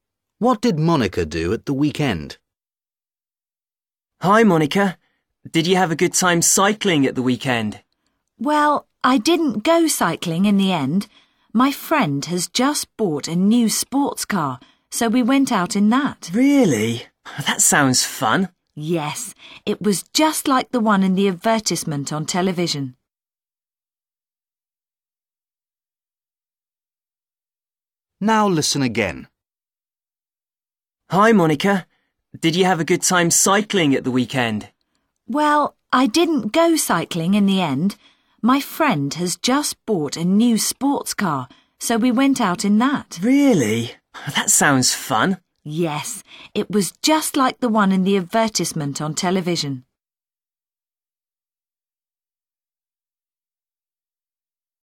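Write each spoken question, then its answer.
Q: What did Monica do at the weekend?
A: She went out in her friend's new sports car.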